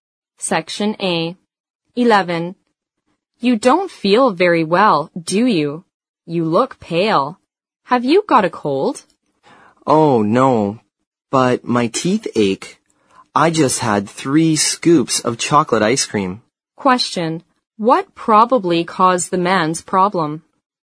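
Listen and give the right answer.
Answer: Eating too much chocolate ice cream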